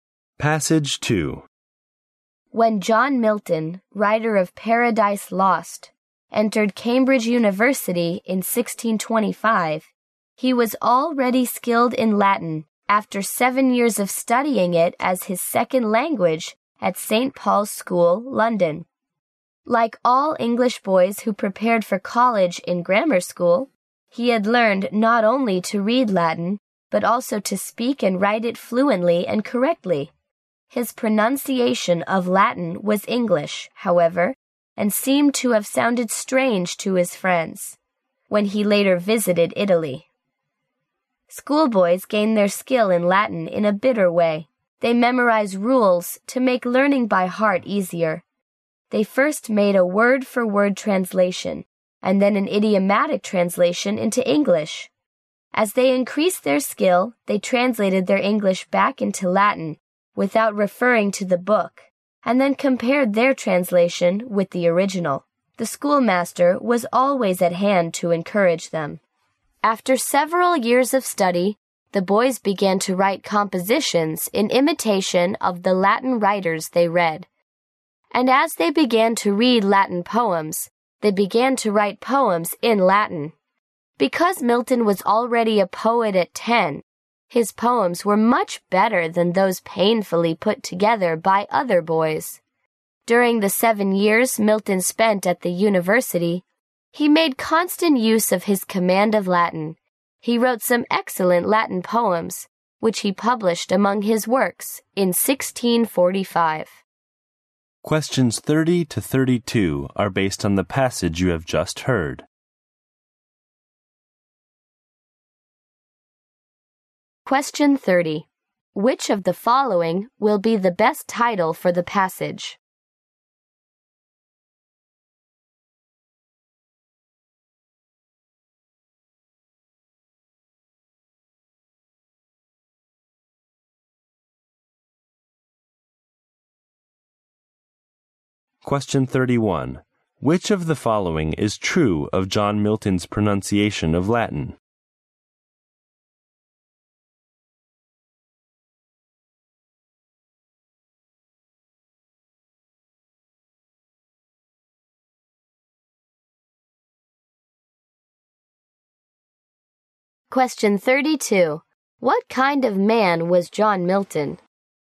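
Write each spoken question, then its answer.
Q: Which of the following is true of John Milton's pronunciation of Latin?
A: It was English and sounded strange to his friends in Italy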